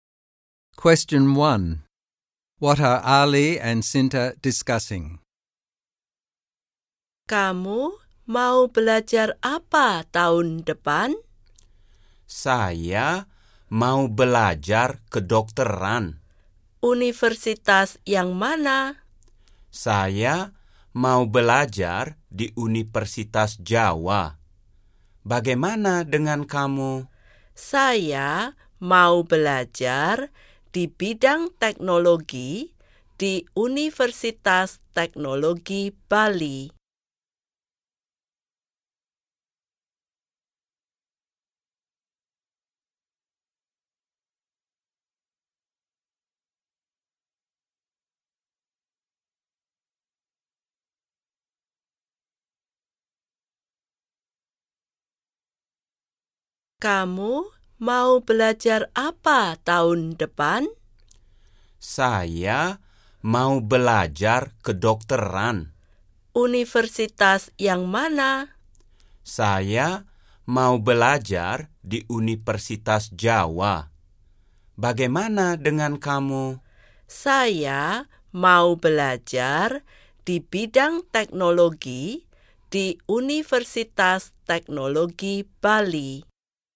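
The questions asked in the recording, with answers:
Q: What are Ali and Sinta discussing?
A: What and where they will study at university next year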